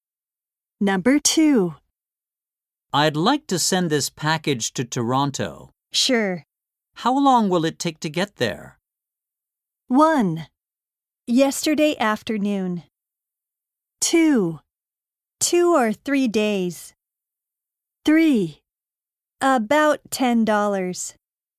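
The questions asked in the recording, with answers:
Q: How long will it take to get there?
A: 2: 2 or 3 days.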